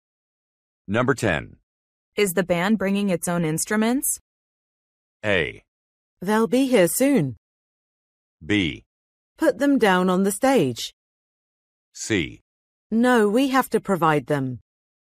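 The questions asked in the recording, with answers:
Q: Is the band bringing its own instruments?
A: C: No, we have to provide them.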